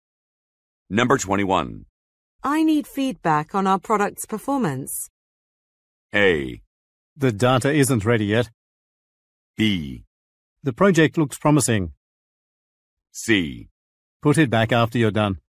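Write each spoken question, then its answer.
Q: I need feedback on our product's performance.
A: A: The data isn't ready yet.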